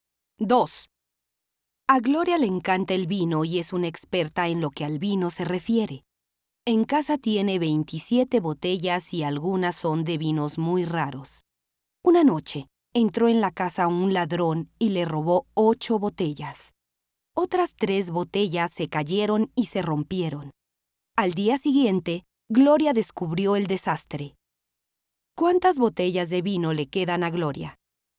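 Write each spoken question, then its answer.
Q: ¿Cuántas botellas de vino le quedan a Gloria?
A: Le quedan 16 botellas.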